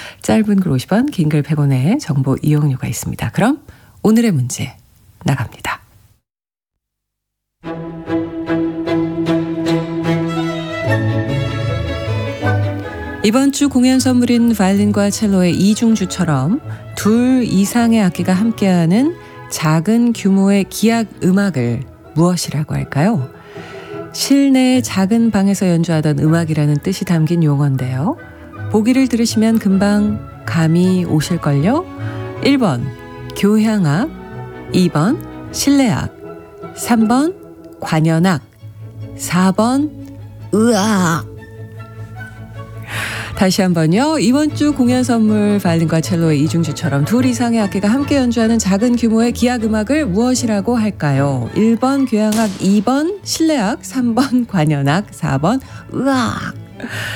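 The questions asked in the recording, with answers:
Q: 이번 주 공연 선물인 바이올린과 첼로의 이중주처럼 둘 이상의 악기가 함께하는 작은 규모의 기악 음악을 무엇이라고 할까요?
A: 2번: 실내악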